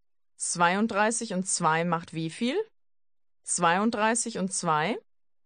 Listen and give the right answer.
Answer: 34. 34.